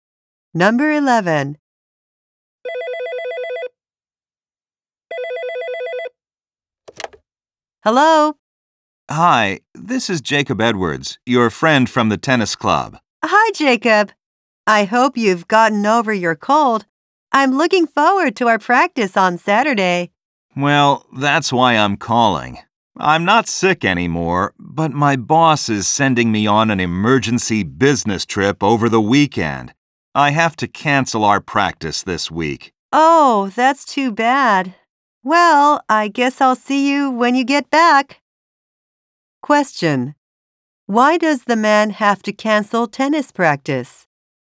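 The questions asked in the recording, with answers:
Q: Why does the man have to cancel tennis practice?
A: He has to go on a business trip.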